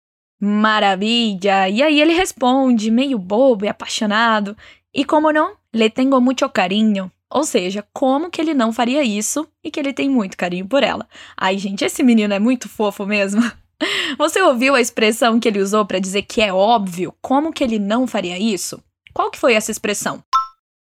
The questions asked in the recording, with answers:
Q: Você ouviu a expressão que ele usou para dizer que é óbvio como que ele não faria isso? Qual que foi essa expressão?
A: E como não?